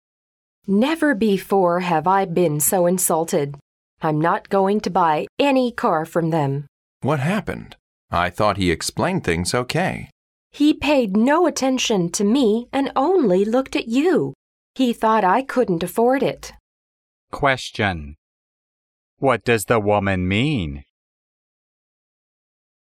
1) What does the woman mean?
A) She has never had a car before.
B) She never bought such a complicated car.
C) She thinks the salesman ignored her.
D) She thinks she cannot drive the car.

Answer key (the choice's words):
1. She thinks the salesman ignored her.

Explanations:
女士提到He paid no attention to me and only looked at you,她因售货员对她不理睬而生气,她想他一定觉得她买不起车。

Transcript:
W: Never before have I been so insulted. I'm not going to buy any car from them.
M: What happened? I thought he explained things okay.
W: He paid no attention to me and only looked at you. He thought I couldn't afford it.
Question: What does the woman mean?